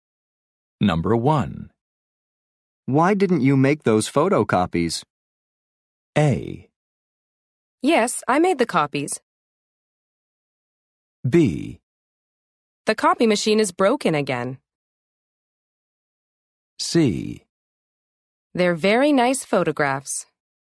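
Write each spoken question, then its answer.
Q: Why didn't you make those photocopies?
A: B: The copy machine is broken again.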